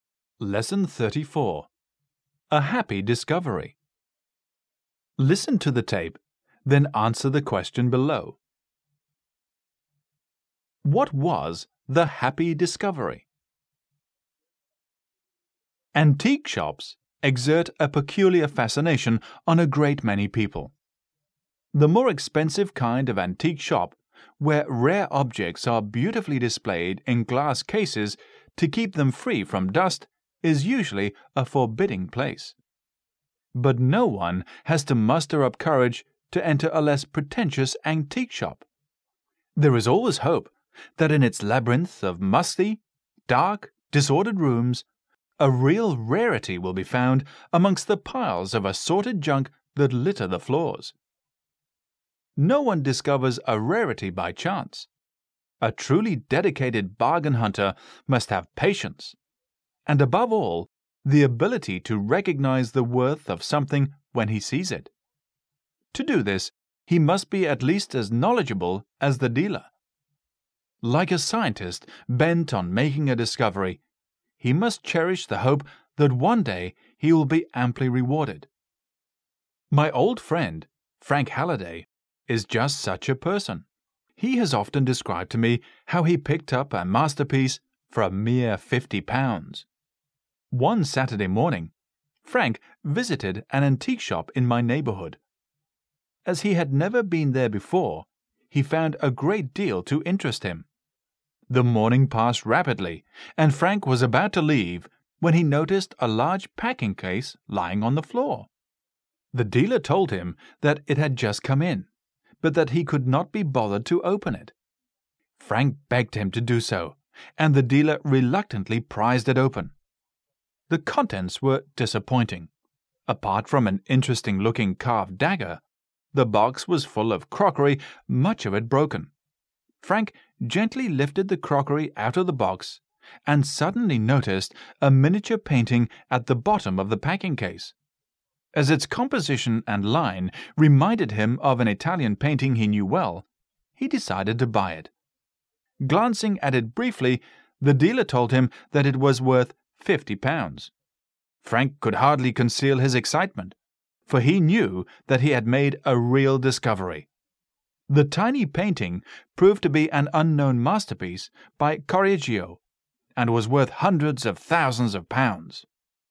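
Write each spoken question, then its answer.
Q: What was the happy discovery?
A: A miniature painting in a packing case that proved to be an unknown masterpiece by Correggio, bought for £50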